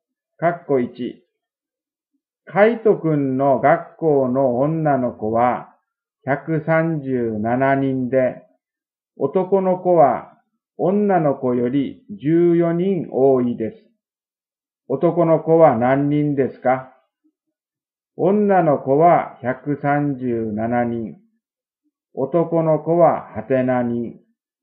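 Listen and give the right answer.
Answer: 151人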